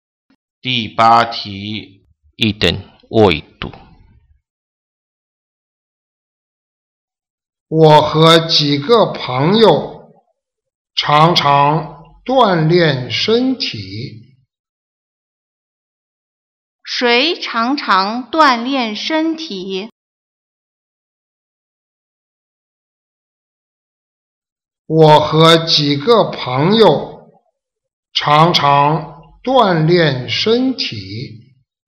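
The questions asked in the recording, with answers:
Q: 谁常常锻炼身体?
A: 我和几个朋友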